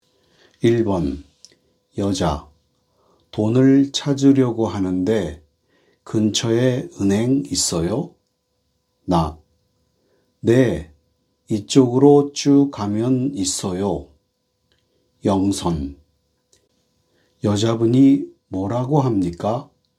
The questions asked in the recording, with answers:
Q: 여자분이 뭐라고 합니까?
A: 근처에 은행이 있냐고 합니다.